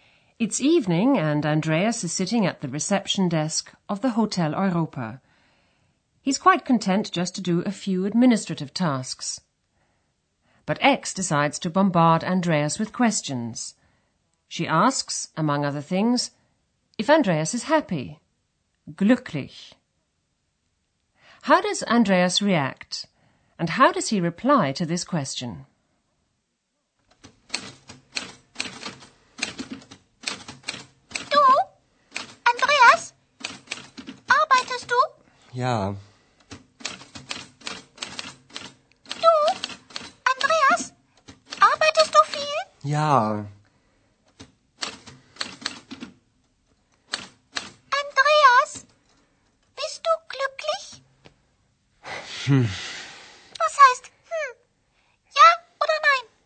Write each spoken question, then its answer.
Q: How does Andreas react?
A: When Ex asks Andreas if he's happy, Andreas mutters an answer